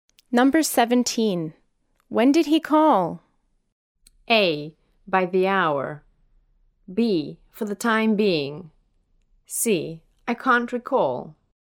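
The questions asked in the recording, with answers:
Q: When did he call?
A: C: I can't recall.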